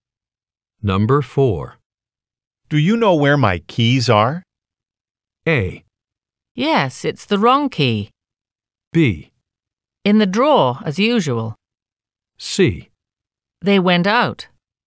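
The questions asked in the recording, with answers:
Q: Do you know where my keys are?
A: B: In the drawer, as usual.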